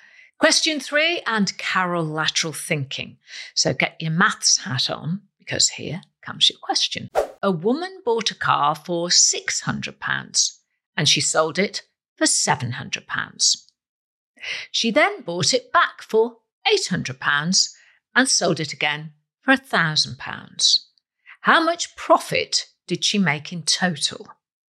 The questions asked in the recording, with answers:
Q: How much profit did she make in total?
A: She made a total profit of £300.